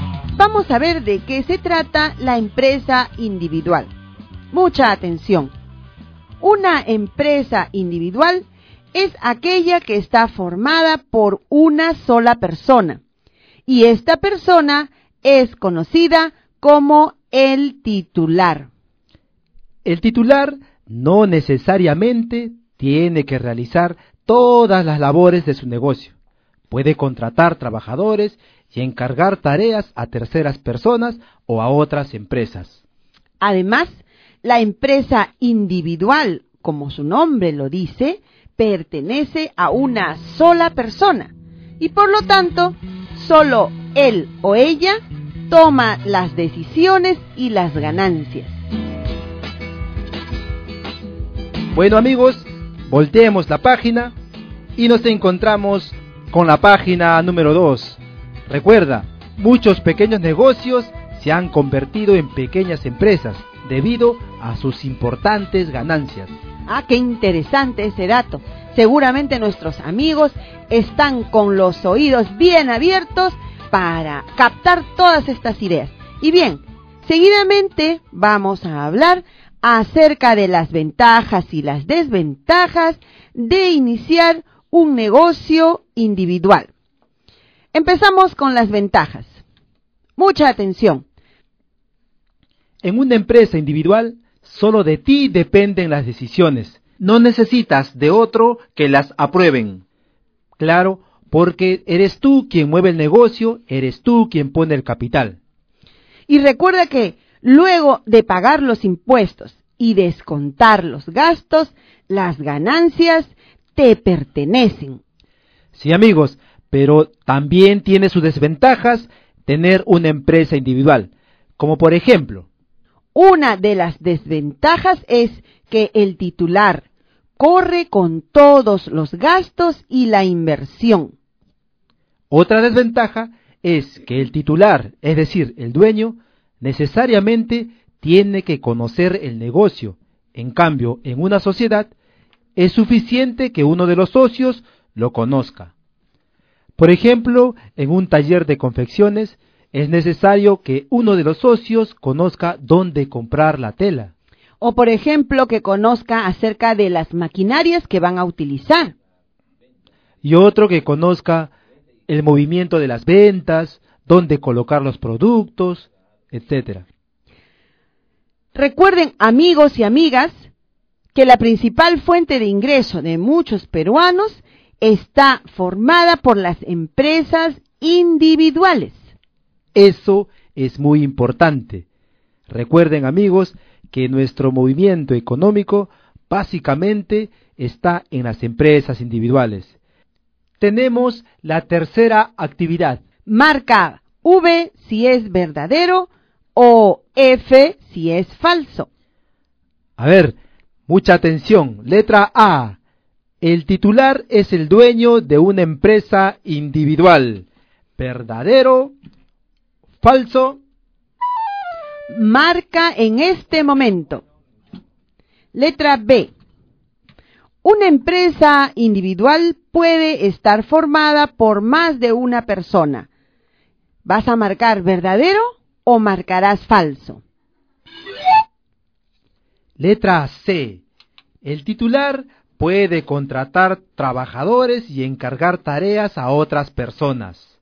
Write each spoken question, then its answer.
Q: El titular es el dueño de una empresa individual.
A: Eso es verdadero, como lo habíamos visto anteriormente.

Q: Una empresa individual puede estar formada por más de una persona.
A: En la letra B yo marqué la alternativa F, que es falso

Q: El titular puede contratar trabajadores y encargar tareas a otras personas.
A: Por lo tanto, aquí debíamos haber marcado verdadero.